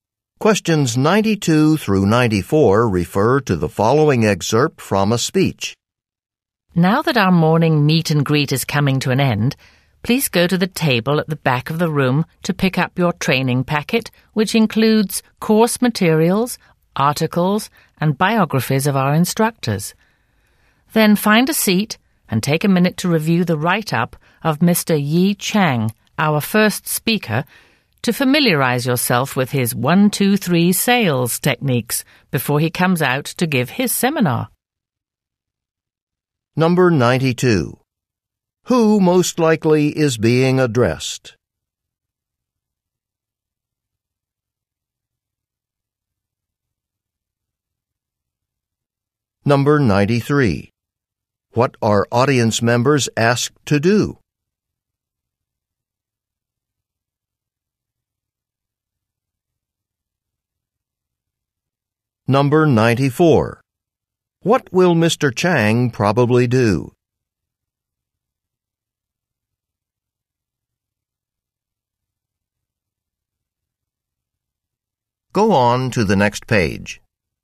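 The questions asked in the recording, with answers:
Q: Who most likely is being addressed?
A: Sales trainees

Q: What are audience members asked to do?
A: Pick up a training packet

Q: What will Mr. Chang probably do?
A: Give a seminar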